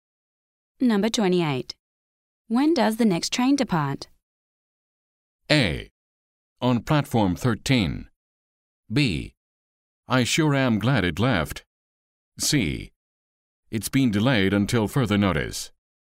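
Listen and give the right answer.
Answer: C: It's been delayed until further notice.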